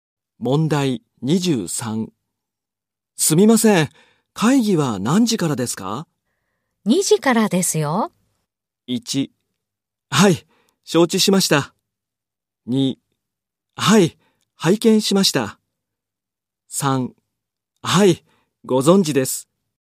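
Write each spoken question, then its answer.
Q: すみません、会議は何時からですか?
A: 3: はい、承知しました。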